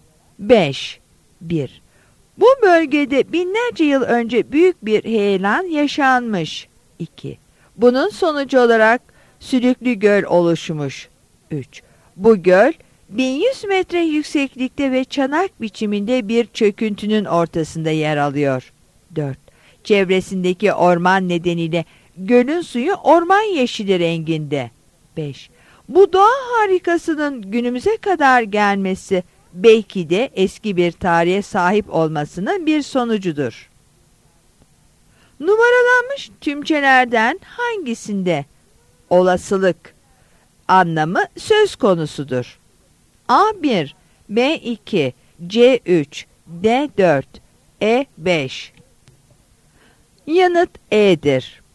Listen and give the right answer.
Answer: Yanıt E'dir.